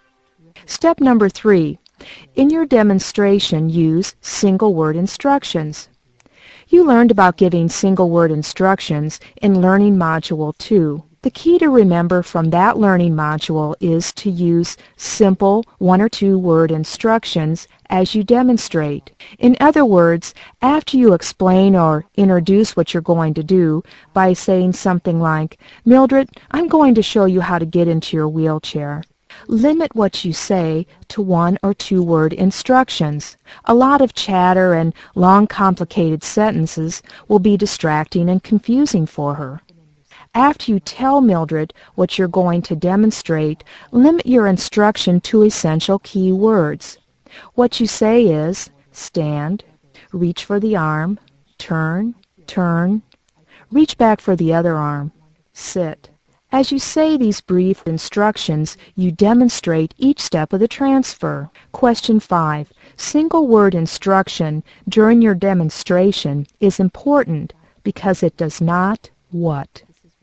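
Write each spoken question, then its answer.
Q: Single word instruction during your demonstration is important because it does not what?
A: Distract or confuse the resident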